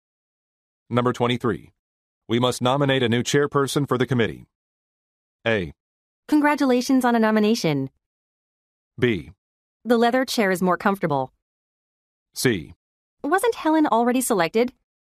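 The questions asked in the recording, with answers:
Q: We must nominate a new chairperson for the committee.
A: C: Wasn't Helen already selected?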